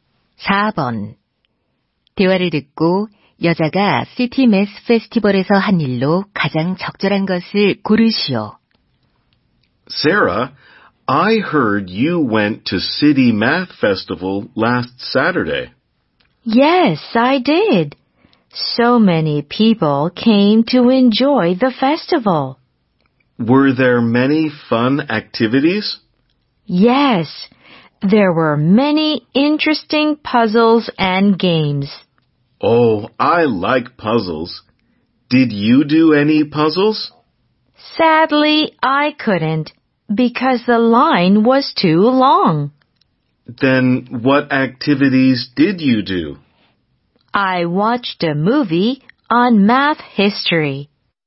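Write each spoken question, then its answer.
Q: 대화를 듣고 여자가 시티 매스 페스티벌에서 한 일로 가장 적절한 것을 고르시오.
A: 수학 역사에 관한 영화 관람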